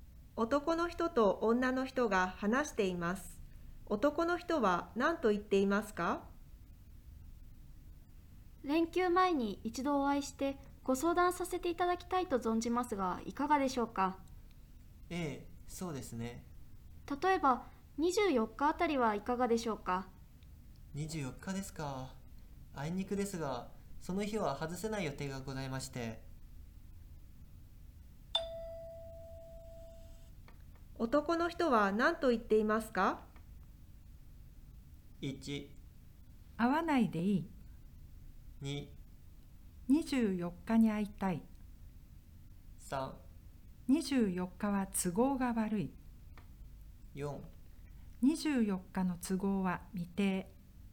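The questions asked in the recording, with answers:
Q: 男の人は何と言っていますか?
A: 3: 24日は都合が悪い。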